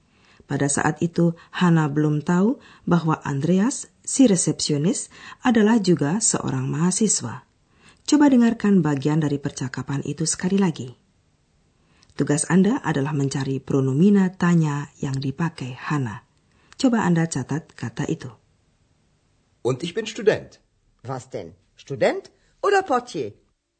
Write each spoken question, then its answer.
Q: Tugas Anda adalah mencari pronomina tanya yang dipakai Hana.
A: Kata ketiga yang dicari adalah pronomina tanya apa was.